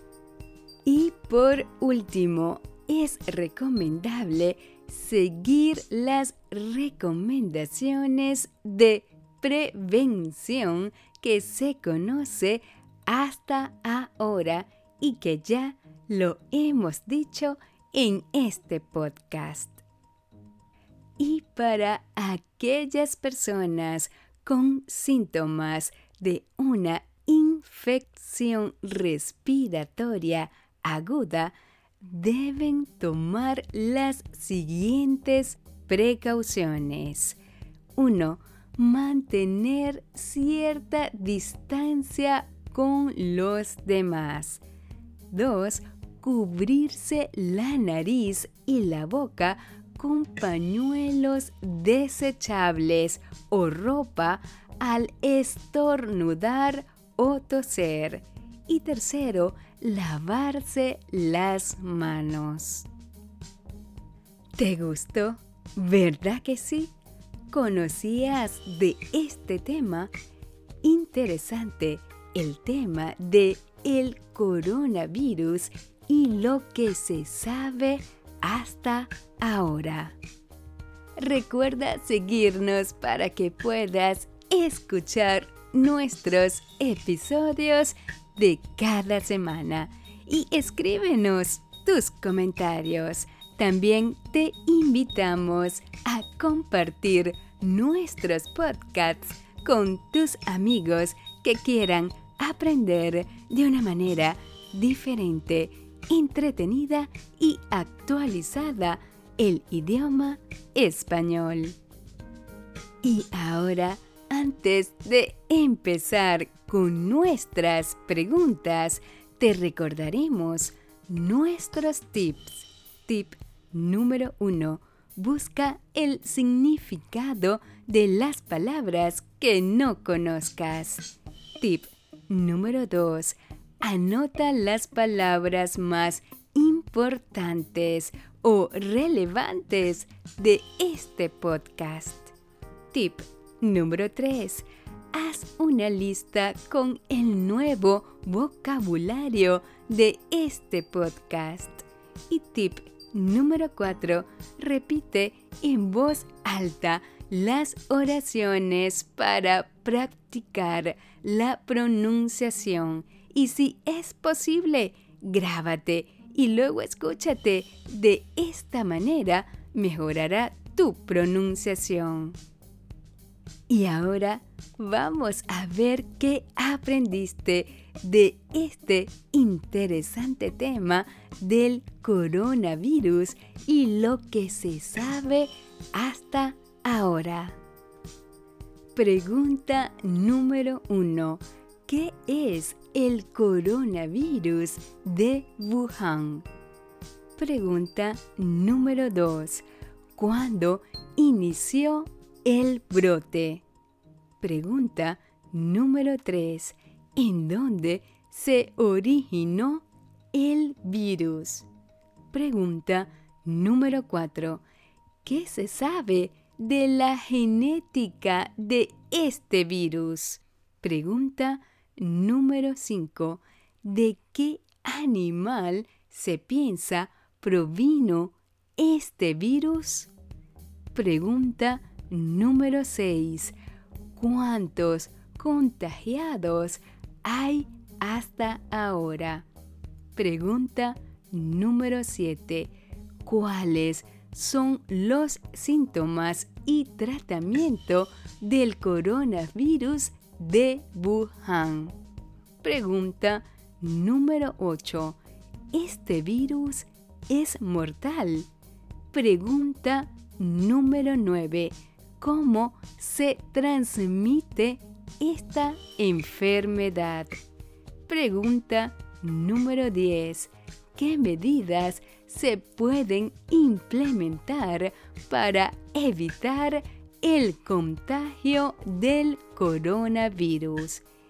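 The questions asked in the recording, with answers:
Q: ¿Qué medidas se pueden implementar para evitar el contagio del coronavirus?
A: Mantener distancia con los demás, cubrirse la nariz y la boca al estornudar o toser, y lavarse las manos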